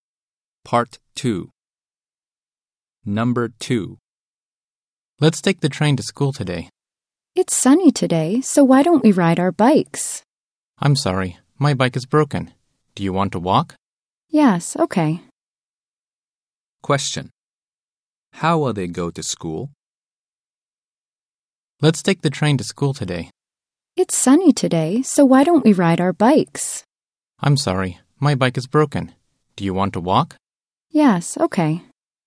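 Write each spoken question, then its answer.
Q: How will they go to school?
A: They will walk.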